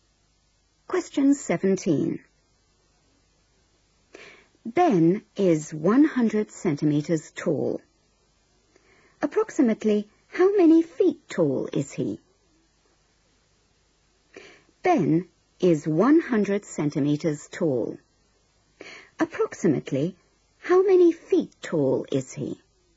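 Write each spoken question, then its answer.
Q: Approximately how many feet tall is he?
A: about 3 feet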